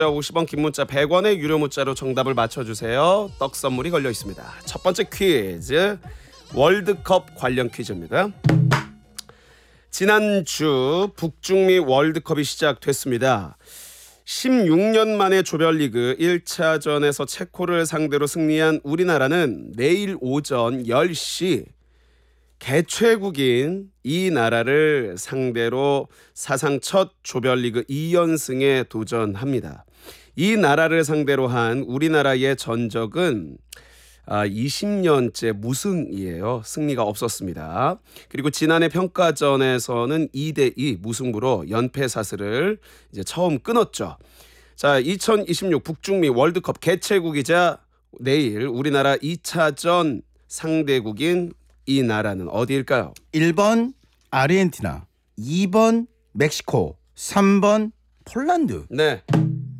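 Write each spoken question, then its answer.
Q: 자, 2026 북중미 월드컵 개최국이자 내일 우리나라 2차전 상대국인 이 나라는 어디일까요?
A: 2: 멕시코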